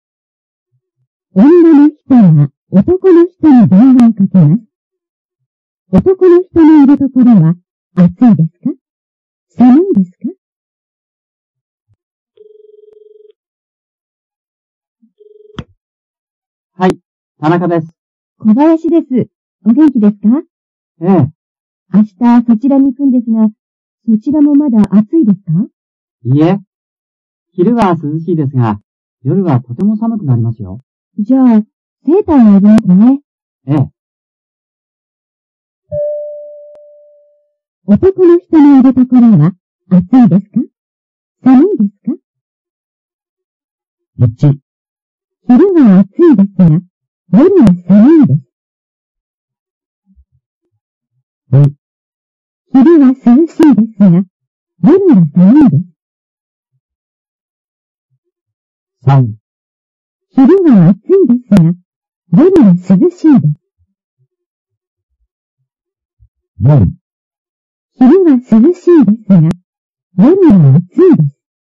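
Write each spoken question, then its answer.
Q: 男の人のいるところは、暑いですか?寒いですか?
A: 2: 昼は涼しいですが、夜は寒いです。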